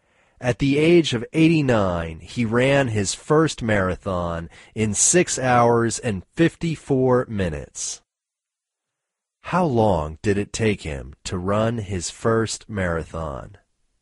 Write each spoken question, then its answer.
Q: How long did it take him to run his first marathon?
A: It took him 6 hours and 54 minutes to run his first marathon.